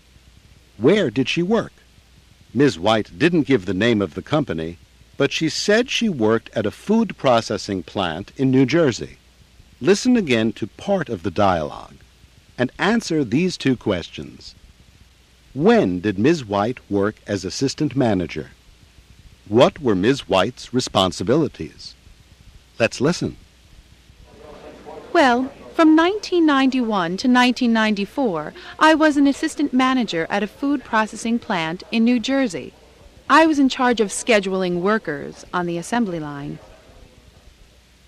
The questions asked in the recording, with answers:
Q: When did Ms. White work as assistant manager?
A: She was assistant manager from 1991 to 1994.

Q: What were Ms. White's responsibilities?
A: She was in charge of scheduling workers.